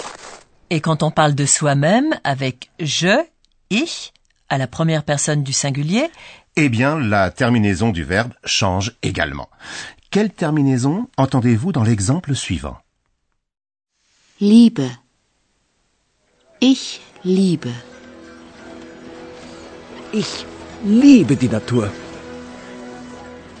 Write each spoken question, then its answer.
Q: Quelle terminaison entendez-vous dans l'exemple suivant Liebe.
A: À la première personne du singulier, on utilise la terminaison E.